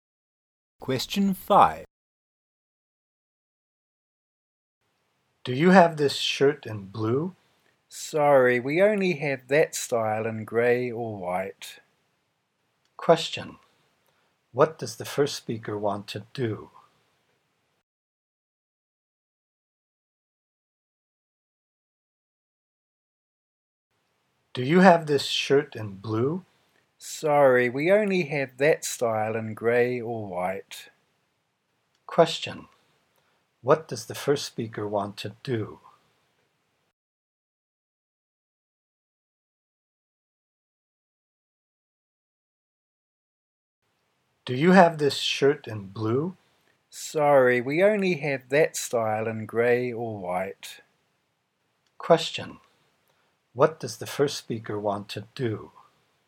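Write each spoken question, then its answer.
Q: What does the first speaker want to do?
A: Buy the shirt in blue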